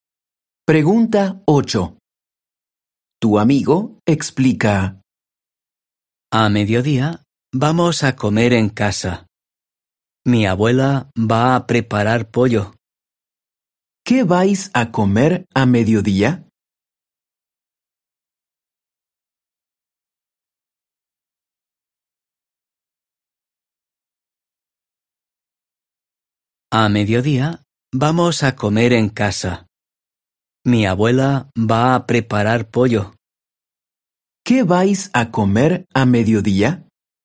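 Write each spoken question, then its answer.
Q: ¿Qué vais a comer a mediodía?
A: Pollo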